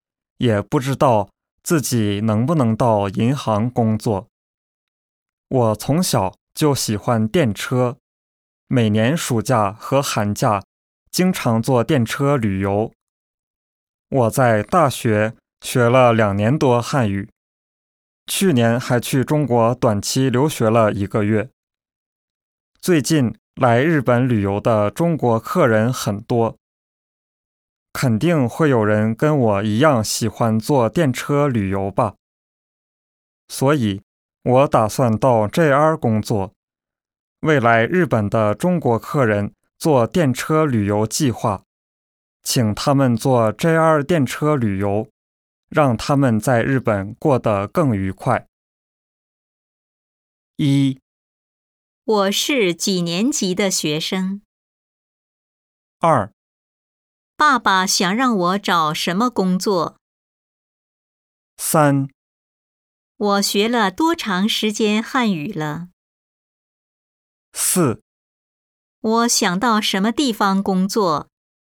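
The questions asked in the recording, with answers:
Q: 我是几年级的学生?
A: 大学三年级

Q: 爸爸想让我找什么工作?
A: 考公务员

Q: 我学了多长时间汉语了?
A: 2年多

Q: 我想到什么地方工作?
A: JR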